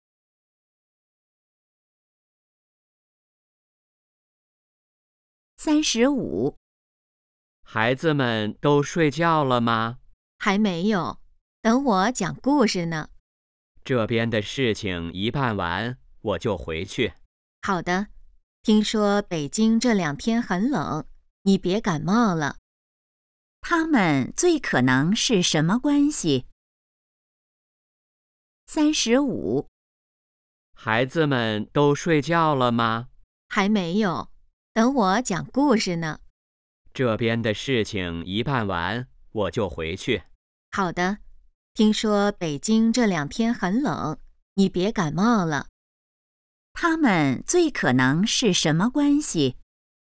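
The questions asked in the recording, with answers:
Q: 他们最可能是什么关系?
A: 夫妻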